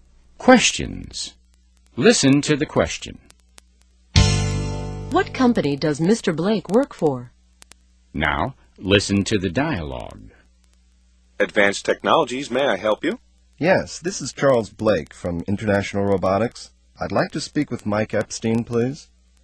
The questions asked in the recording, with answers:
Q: What company does Mr. Blake work for?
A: He works for International Robotics.